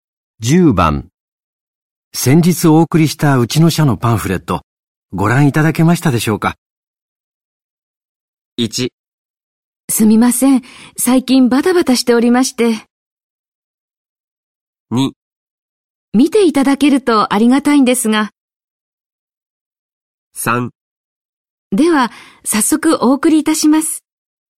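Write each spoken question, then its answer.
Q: 先日お送りしたうちの社のパンフレット、ご覧いただけましたでしょうか?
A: 1: すみません。最近バタバタしておりまして。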